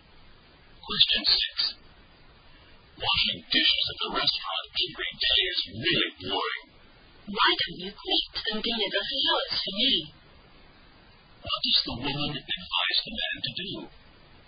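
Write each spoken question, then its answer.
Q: What does the woman advise the man to do?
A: Quit his restaurant job and deliver flowers for her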